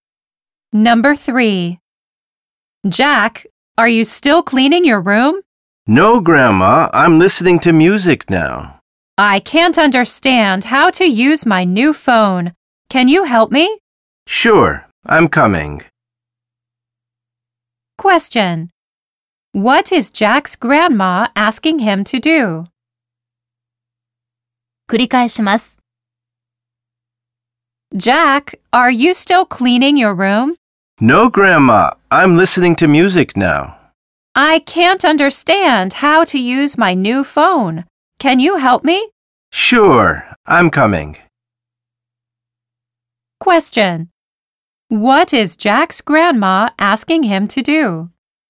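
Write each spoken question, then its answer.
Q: What is Jack's grandma asking him to do?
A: To help her use her new phone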